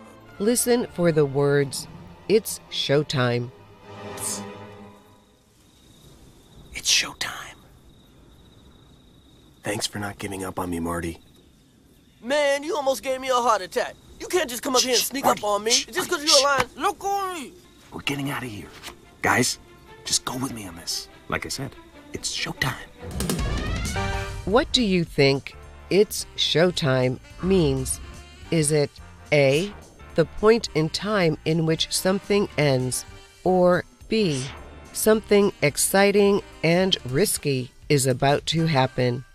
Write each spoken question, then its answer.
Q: What do you think "it's showtime" means?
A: The answer is B, something exciting and risky is about to happen.